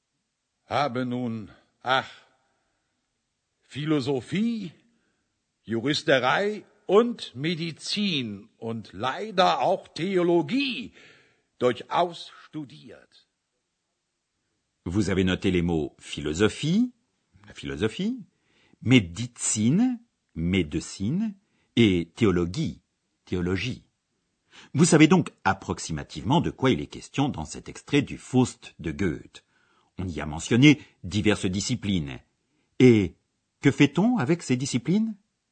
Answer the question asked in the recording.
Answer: Exact. On étudie. Étudier.